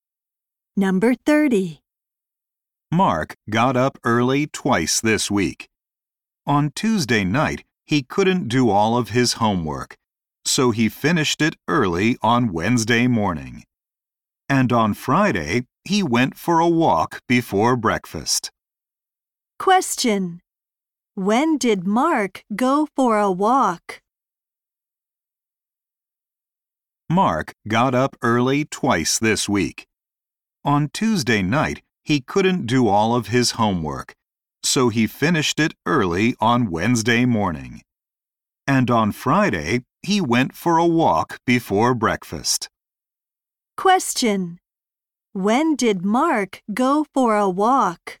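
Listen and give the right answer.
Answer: On Friday, before breakfast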